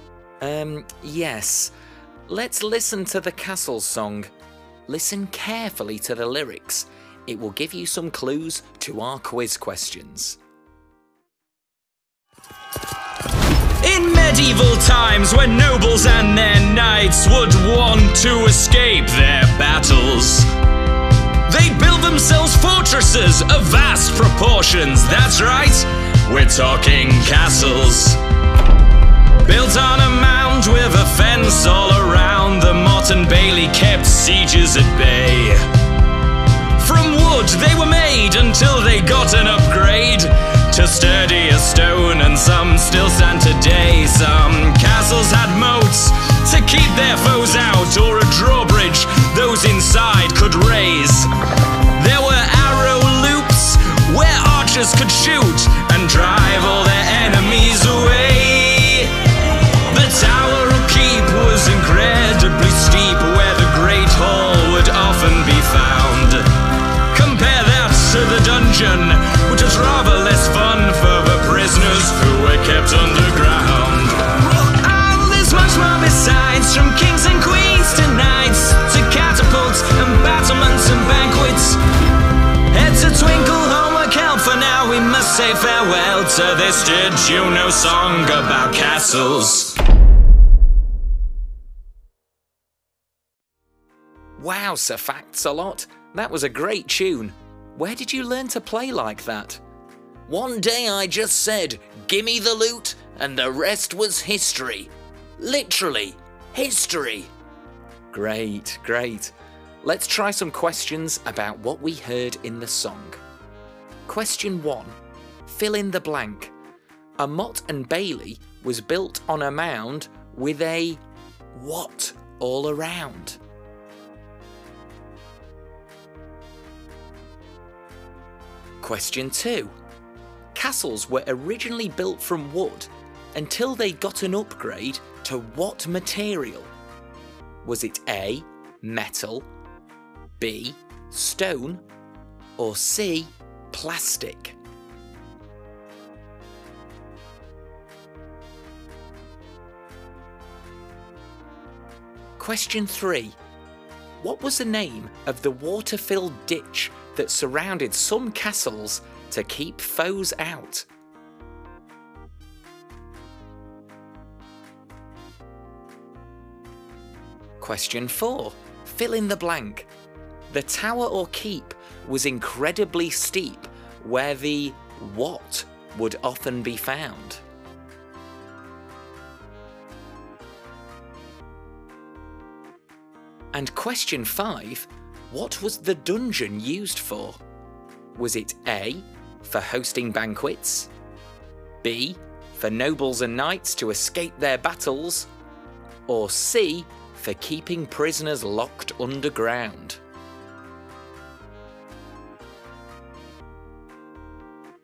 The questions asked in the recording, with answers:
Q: A Mott and Bailey was built on a mound with a what all around?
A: The answer is a fence.

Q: Castles were originally built from wood until they got an upgrade to what material?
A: So the answer is B, stone.

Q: What was the name of the water-filled ditch that surrounded some castles to keep foes out?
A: A moat was used to keep enemies from the castle.

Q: What was the dungeon used for?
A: The answer is C.